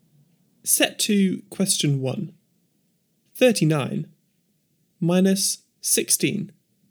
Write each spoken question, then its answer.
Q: 39 minus 16.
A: Answer 23.